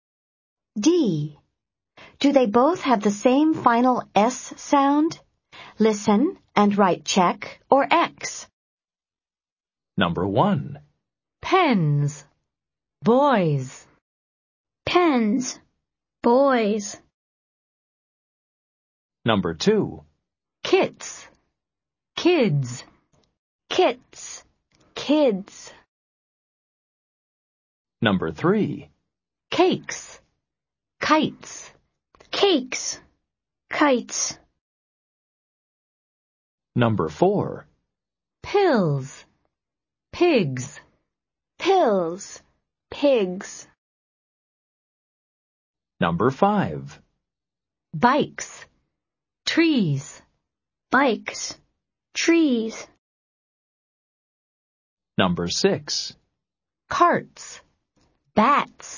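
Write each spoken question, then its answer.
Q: Pens. Boys.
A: Yes (check): both /z/

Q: Kits. Kids.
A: No (X): /s/ vs /z/

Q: Cakes. Kites.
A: Yes (check): both /s/

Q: Pills. Pigs.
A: Yes (check): both /z/

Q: Bikes. Trees.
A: No (X): /s/ vs /z/

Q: Carts. Bats.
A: Yes (check): both /s/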